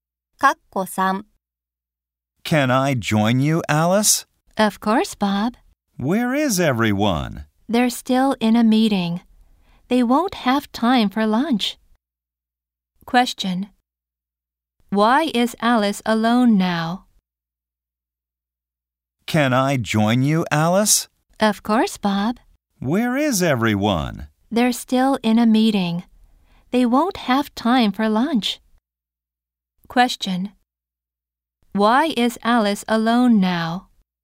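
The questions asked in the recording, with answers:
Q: Why is Alice alone now?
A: Everyone else is still in a meeting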